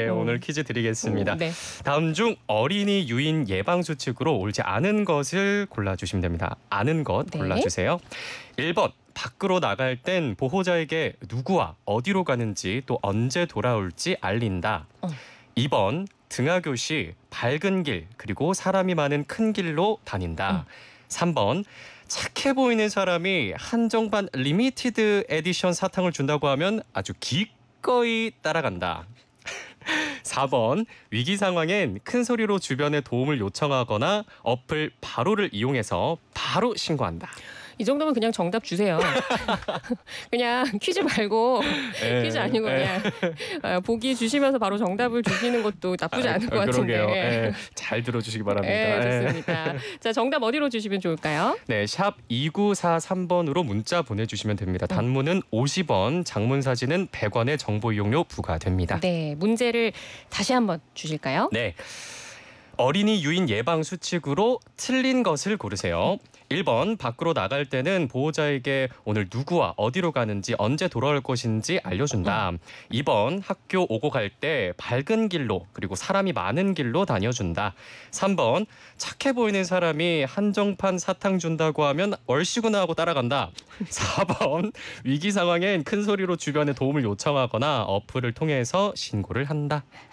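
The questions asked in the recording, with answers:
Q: 다음 중 어린이 유인 예방수칙으로 옳지 않은 것을 골라주시면 됩니다.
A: 3: 착해 보이는 사람이 한정판 사탕을 준다고 하면 따라간다.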